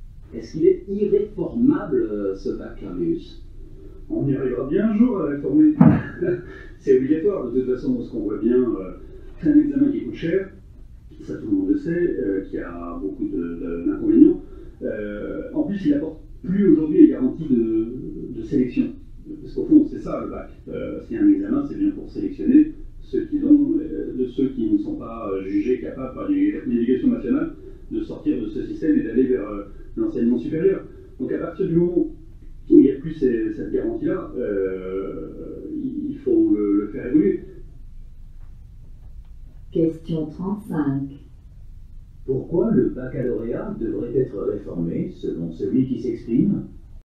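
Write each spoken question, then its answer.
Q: Pourquoi le baccalauréat devrait être réformé selon celui qui s'exprime ?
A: Parce qu'il coûte cher et n'apporte plus les garanties de sélection.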